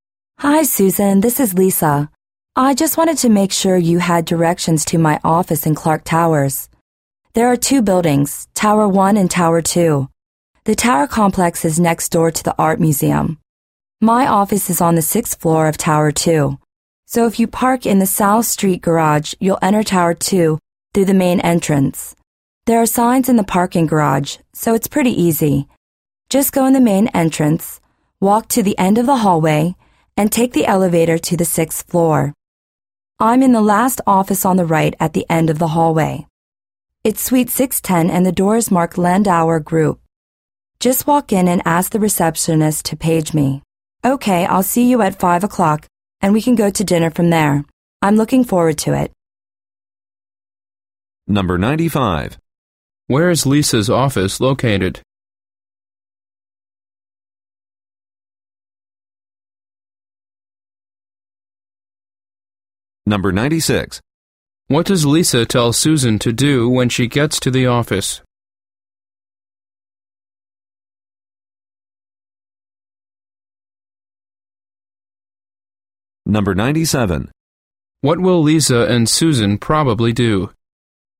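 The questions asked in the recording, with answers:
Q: Where is Lisa's office located?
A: On the sixth floor of Tower 2 in Clark Towers, suite 610

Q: What does Lisa tell Susan to do when she gets to the office?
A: Walk in and ask the receptionist to page her

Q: What will Lisa and Susan probably do?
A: Go to dinner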